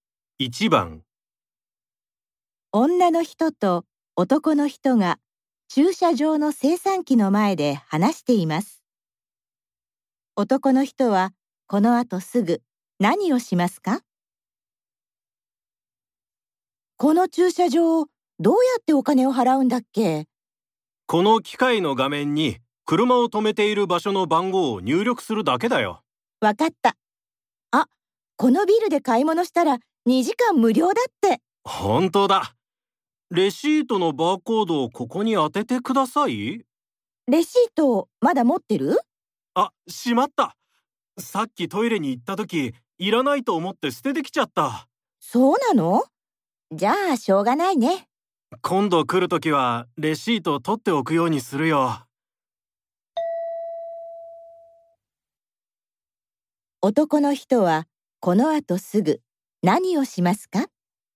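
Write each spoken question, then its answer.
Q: 男の人はこのあとすぐ何をしますか?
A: 画面に車を止めている場所の番号を入力して料金を払う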